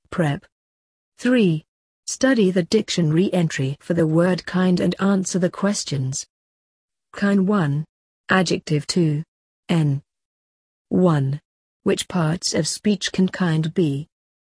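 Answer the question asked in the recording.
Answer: An adjective and a noun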